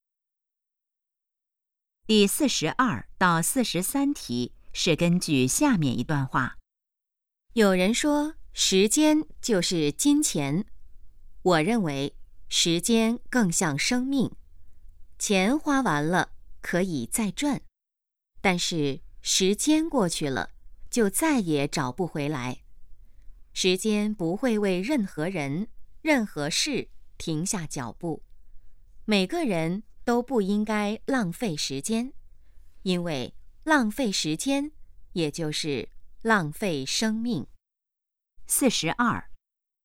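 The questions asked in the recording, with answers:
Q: 书画人认为时间更像什么?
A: 生命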